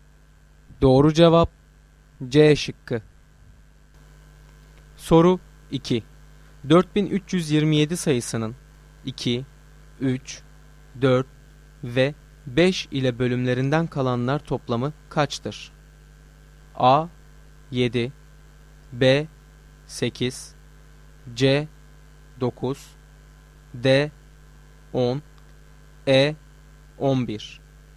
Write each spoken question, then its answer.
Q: 4327 sayısının 2, 3, 4 ve 5 ile bölümlerinden kalanlar toplamı kaçtır?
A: Doğru cevap A şıkkı.